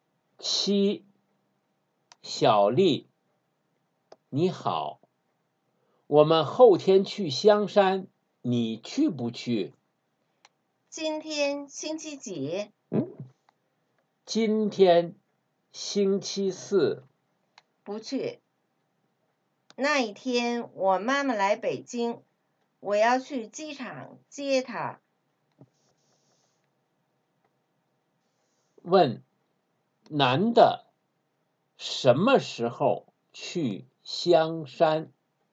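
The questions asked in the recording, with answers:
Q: 男的什么时候去香山?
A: 后天(星期六)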